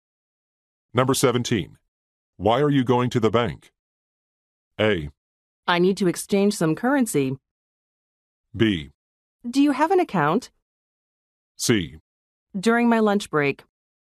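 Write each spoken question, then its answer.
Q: Why are you going to the bank?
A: A: I need to exchange some currency.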